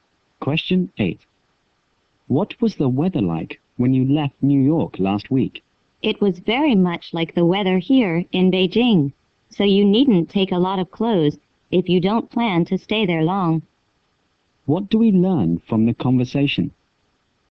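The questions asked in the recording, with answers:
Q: What do we learn from the conversation?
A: The weather in New York is much like the weather in Beijing.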